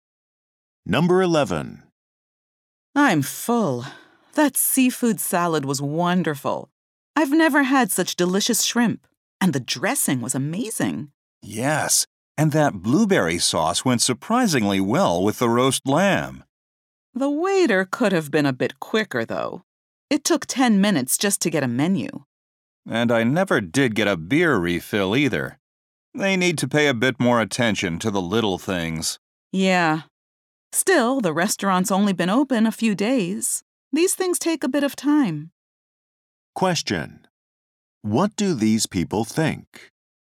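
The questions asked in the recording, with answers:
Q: What do these people think?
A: The food was great but the service was slow; the new restaurant needs time.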